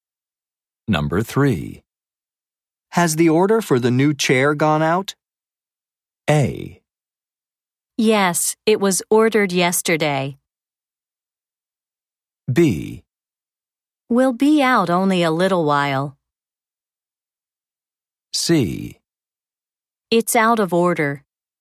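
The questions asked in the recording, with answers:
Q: Has the order for the new chair gone out?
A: A: Yes, it was ordered yesterday.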